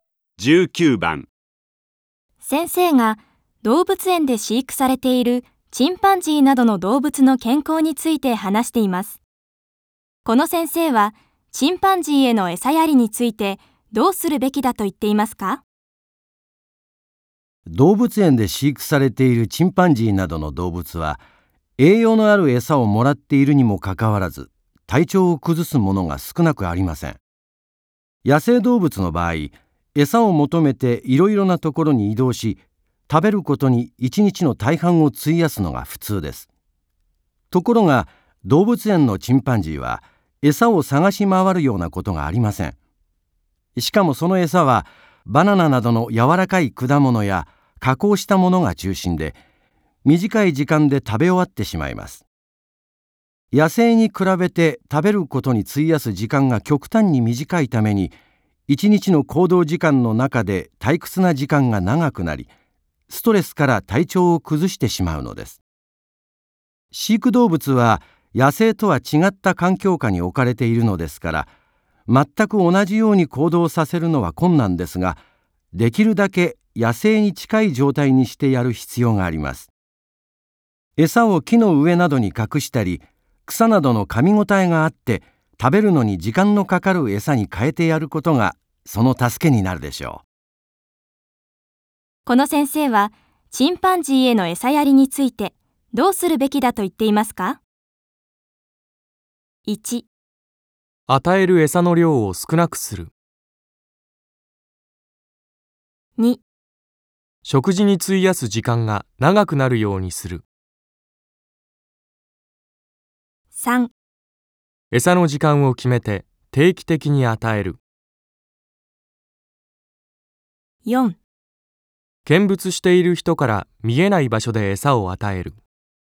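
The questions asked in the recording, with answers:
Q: この先生は、チンパンジーへの餌やりについて、どうするべきだと言っていますか?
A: 2: 食事に費やす時間が長くなるようにする。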